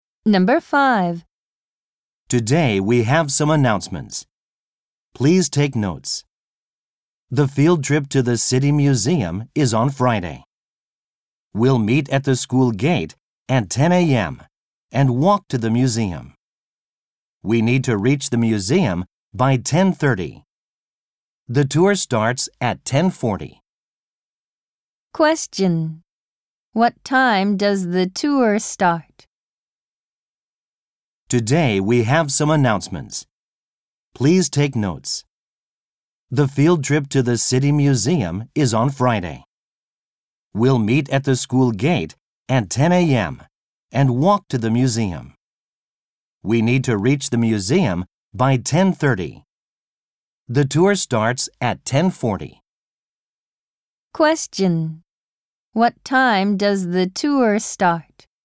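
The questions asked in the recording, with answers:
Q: What time does the tour start?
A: 10:40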